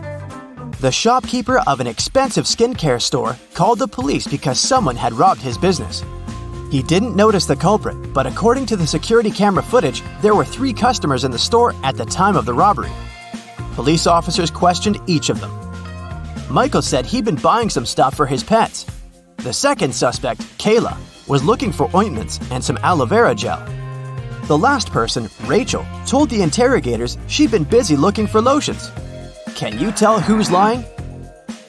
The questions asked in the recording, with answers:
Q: Can you tell who's lying?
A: Michael is the culprit.